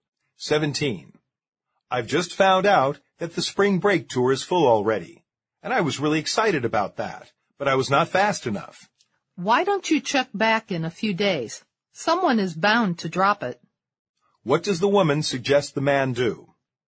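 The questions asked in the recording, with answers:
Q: What does the woman suggest the man do?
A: Check back in a few days, since someone may drop out of the tour.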